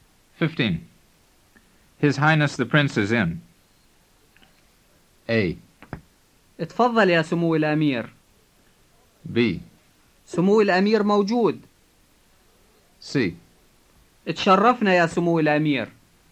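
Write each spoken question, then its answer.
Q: His Highness the Prince is in.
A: B: سمو الأمير موجود.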